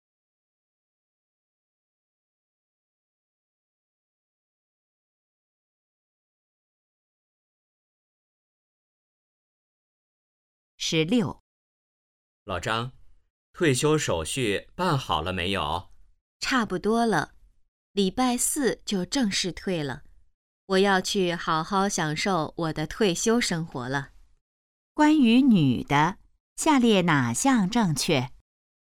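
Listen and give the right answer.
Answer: 她礼拜四就正式退休了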